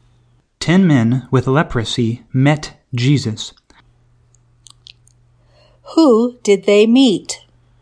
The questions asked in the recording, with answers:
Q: Who did they meet?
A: They met Jesus.